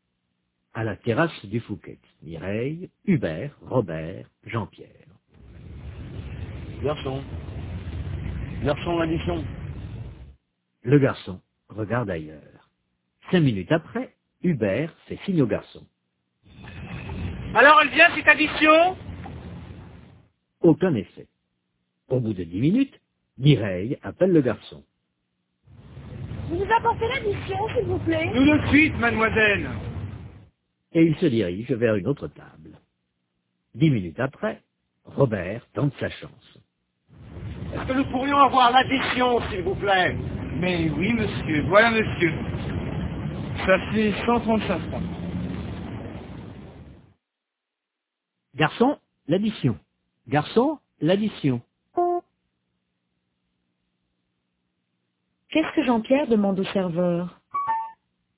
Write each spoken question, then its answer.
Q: Qu'est-ce que Jean-Pierre demande au serveur?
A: L'addition.